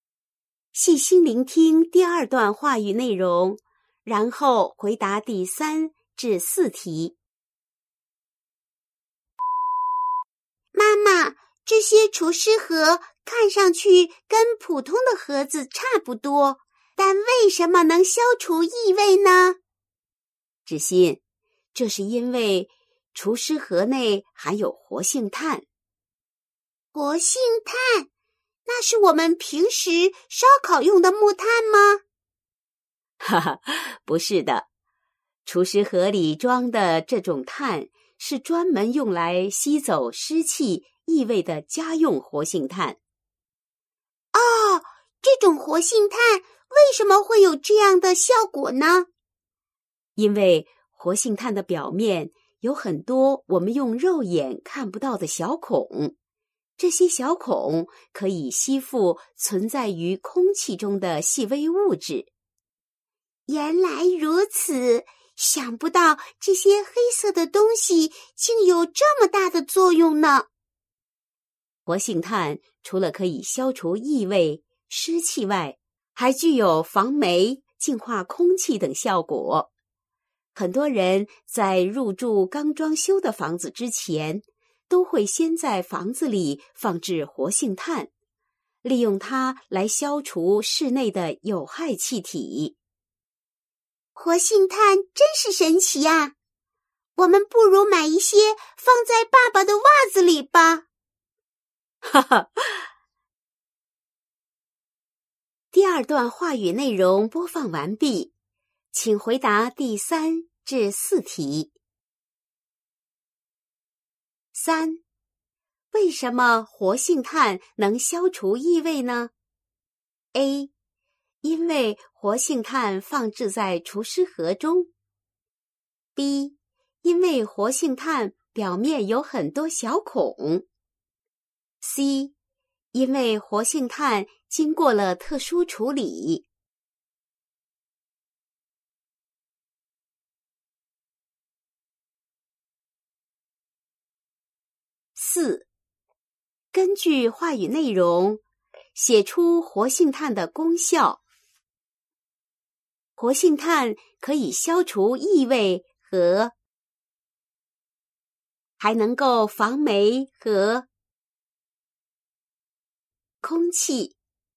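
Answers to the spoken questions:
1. B: 因为活性炭表面有很多小孔。
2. 湿气;净化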